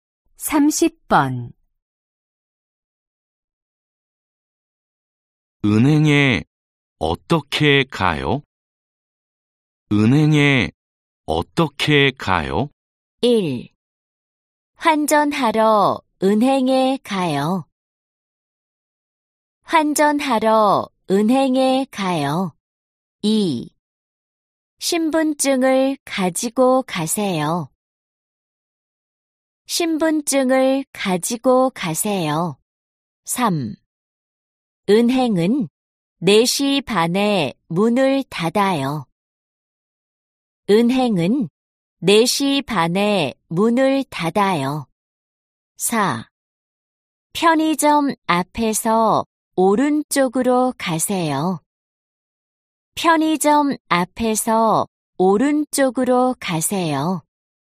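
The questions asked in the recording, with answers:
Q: 은행에 어떻게 가요?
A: 4: 편의점 앞에서 오른쪽으로 가세요.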